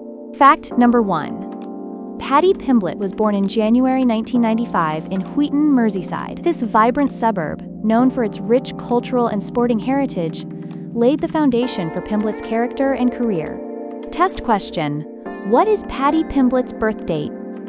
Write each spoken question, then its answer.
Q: what is Patty Pimblett's birth date?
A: January 1995.